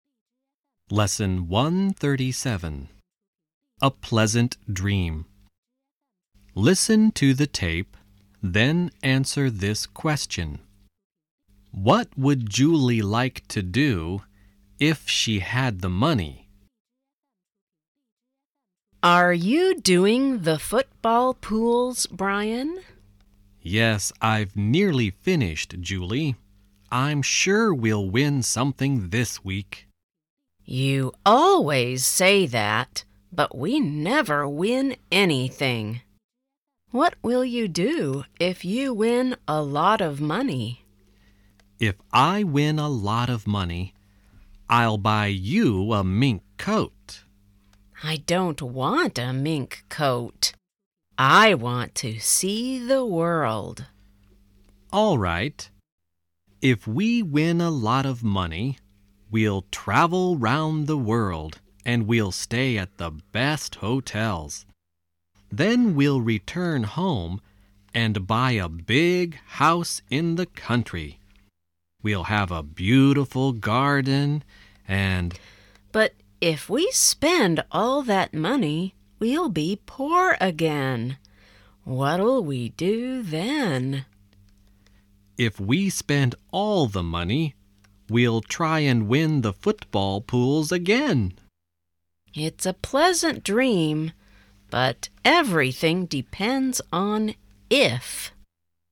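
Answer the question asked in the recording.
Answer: See the world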